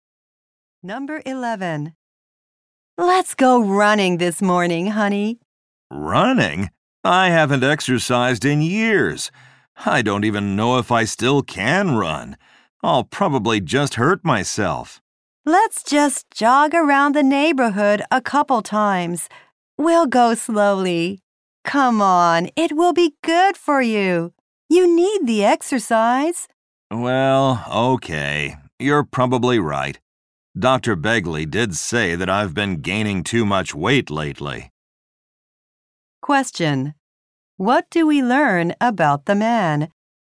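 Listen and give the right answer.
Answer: He has been gaining too much weight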